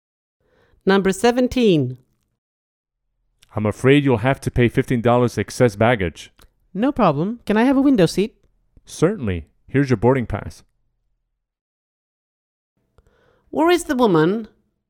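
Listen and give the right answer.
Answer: At the airport check-in desk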